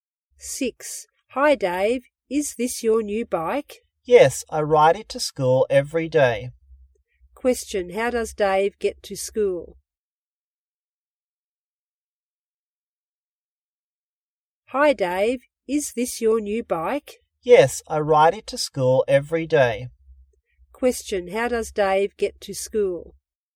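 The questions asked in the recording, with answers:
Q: how does Dave get to school?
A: By bike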